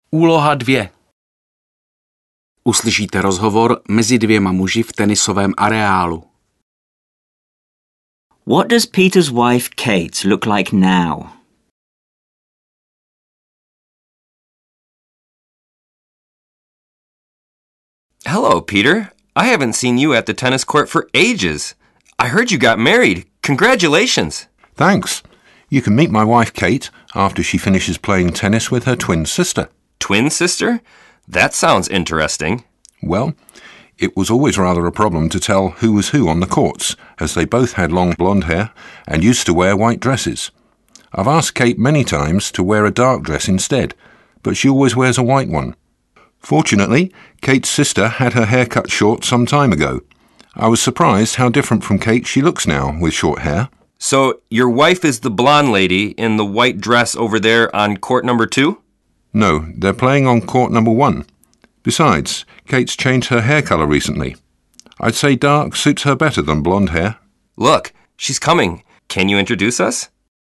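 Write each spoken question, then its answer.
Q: What does Peter's wife Kate look like now?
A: She has long dark hair and wears a white dress.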